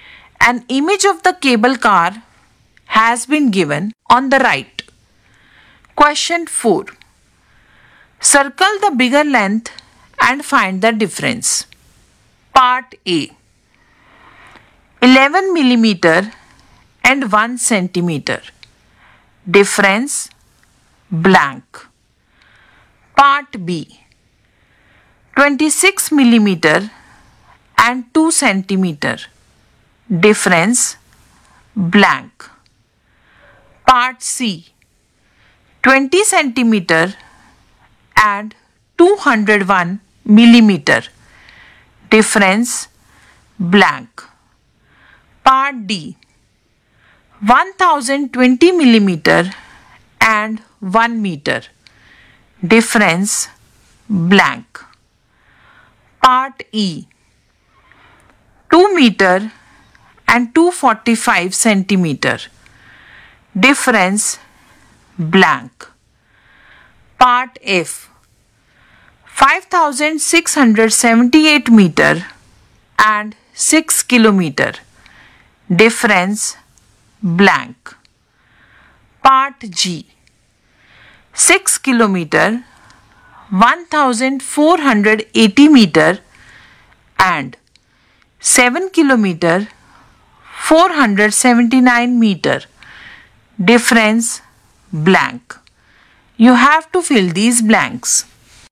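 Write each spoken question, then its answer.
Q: 11 mm and 1 cm. Difference blank.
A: 11 mm is bigger; difference 1 mm

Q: 26 mm and 2 cm. Difference blank.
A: 26 mm is bigger; difference 6 mm

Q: 20 cm and 201 mm.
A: 201 mm is bigger; difference 1 mm

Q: 1020 mm and 1 meter. Difference blank.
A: 1020 mm is bigger; difference 20 mm

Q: 2 meter and 245 centimeter.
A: 245 centimeter is bigger; difference 45 centimeter

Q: 5678 meter and 6 kilometer.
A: 6 kilometer is bigger; difference 322 meter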